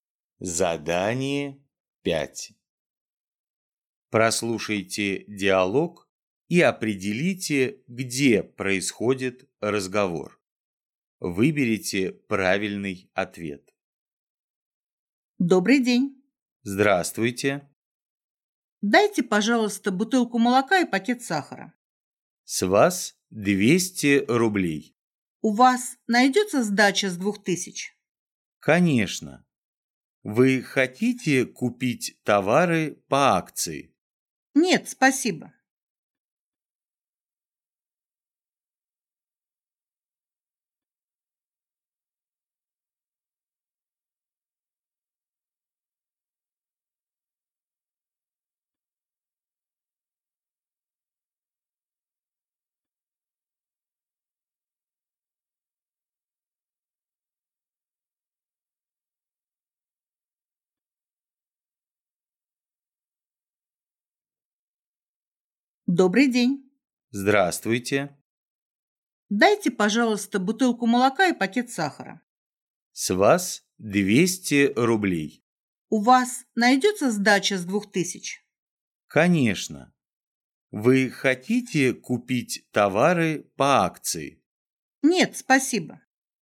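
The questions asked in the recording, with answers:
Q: Прослушайте диалог и определите, где происходит разговор.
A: В магазине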